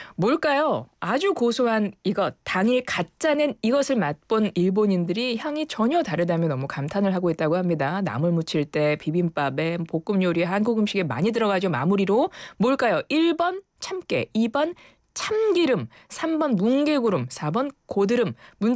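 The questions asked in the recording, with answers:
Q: 뭘까요? 1번 참깨, 2번 참기름, 3번 뭉게구름, 4번 고드름.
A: 2: 참기름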